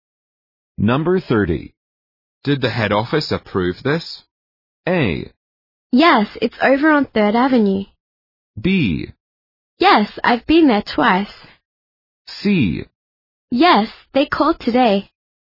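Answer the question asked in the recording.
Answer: C: Yes, they called today.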